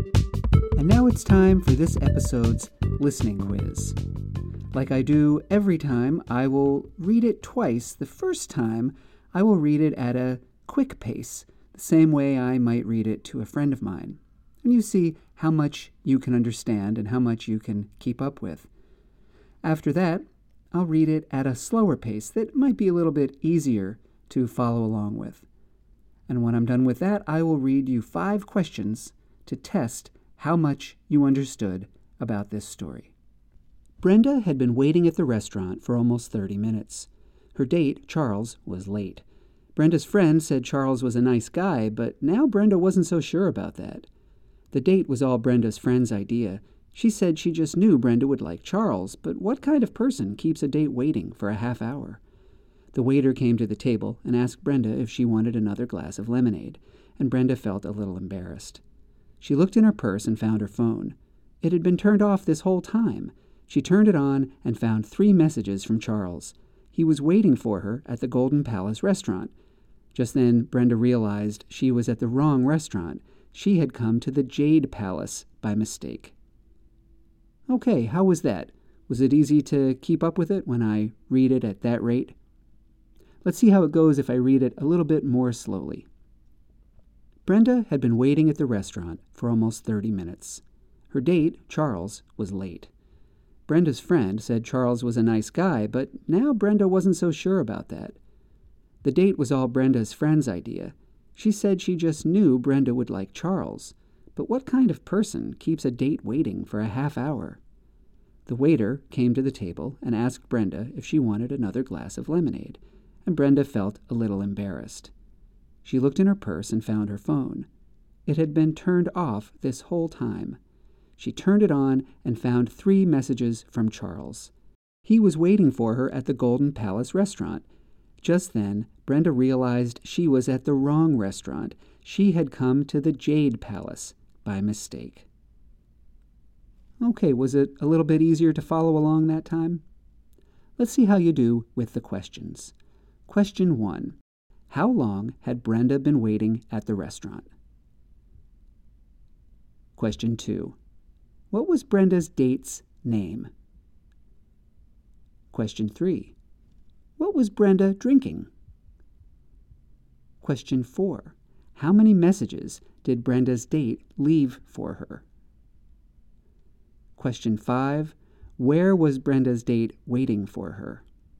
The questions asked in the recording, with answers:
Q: How long had Brenda been waiting at the restaurant?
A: About 30 minutes.

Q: What was Brenda's date's name?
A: Her date was Charles.

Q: What was Brenda drinking?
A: Brenda was drinking lemonade.

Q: How many messages did Brenda's date leave for her?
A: He left 3 messages.

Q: Where was Brenda's date waiting for her?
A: He was waiting for her at the Golden Palace restaurant.